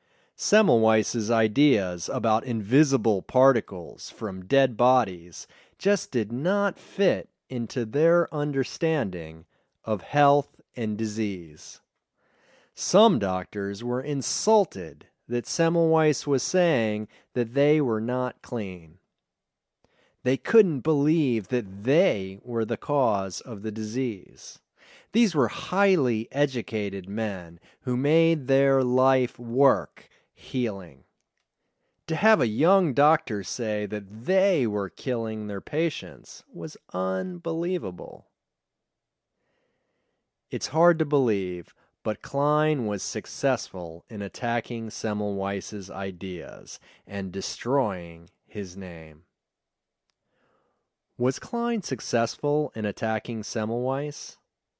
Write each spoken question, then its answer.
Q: Was Klein successful in attacking Semmelweis?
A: Yes, he was successful in attacking Semmelweis.